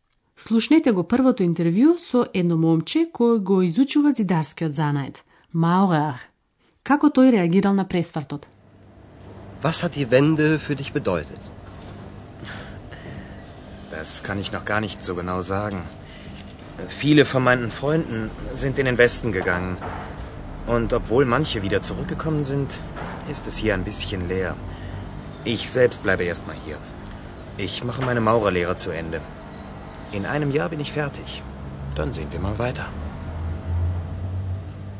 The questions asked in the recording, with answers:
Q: Како тој реагирал на пресвртот?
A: Момчето се уште не е сигурно и се уште не може точно да процени што значи тоа за него.